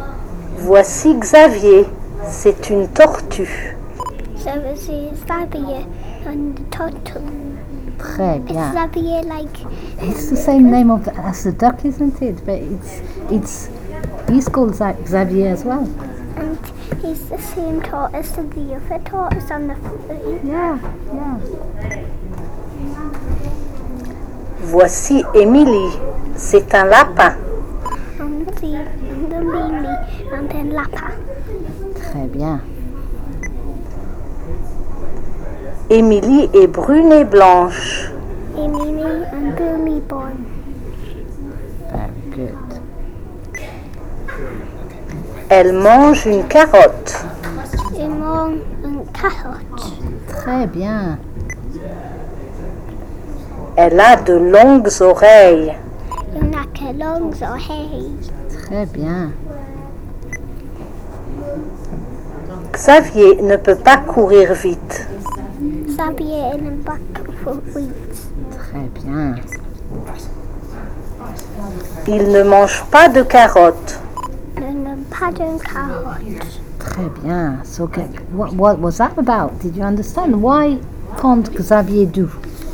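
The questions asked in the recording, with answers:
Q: Why can't Xavier do?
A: He can't run fast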